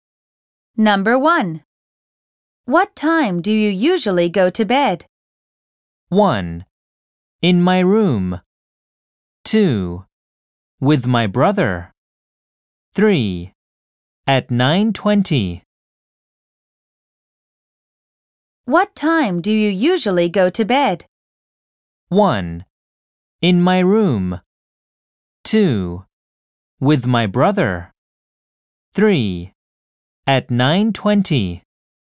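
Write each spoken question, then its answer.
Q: What time do you usually go to bed?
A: 3: At 9:20.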